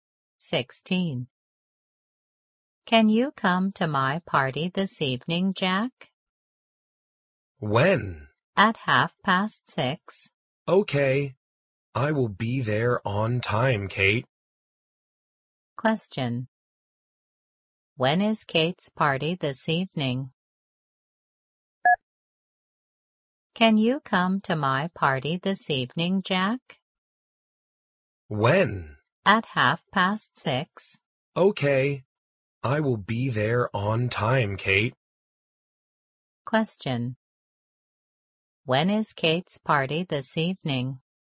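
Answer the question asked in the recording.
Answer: At 6:30.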